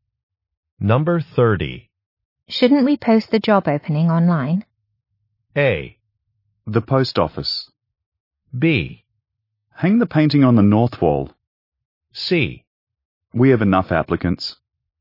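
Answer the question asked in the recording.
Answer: C: We have enough applicants.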